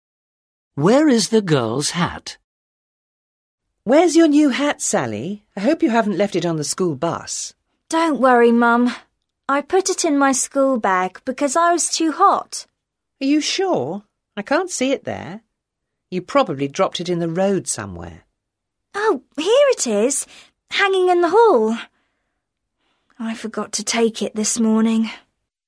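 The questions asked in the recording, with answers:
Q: Where is the girl's hat?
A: hanging in the hall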